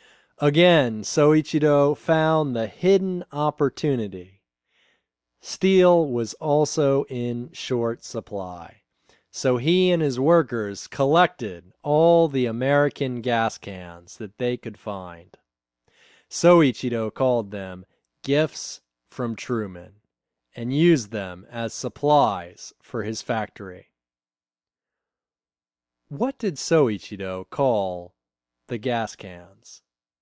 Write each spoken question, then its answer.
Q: What did Soichiro call the gas cans?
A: He called them gifts from Truman.